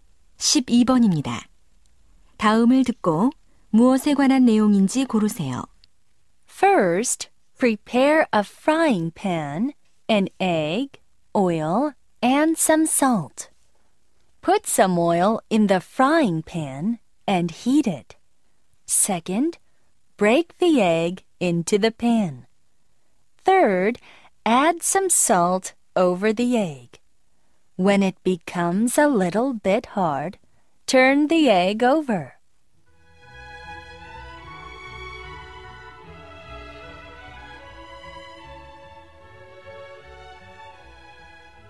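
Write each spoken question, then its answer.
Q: 다음을 듣고 무엇에 관한 내용인지 고르세요.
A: 달걀 프라이 만드는 법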